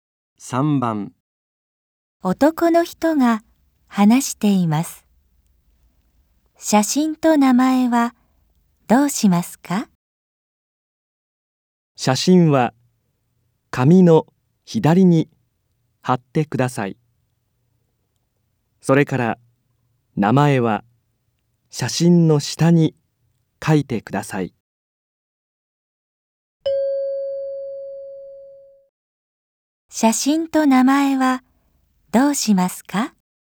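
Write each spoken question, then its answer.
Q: 写真と名前はどうしますか?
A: 写真は紙の左に貼り、名前は写真の下に書く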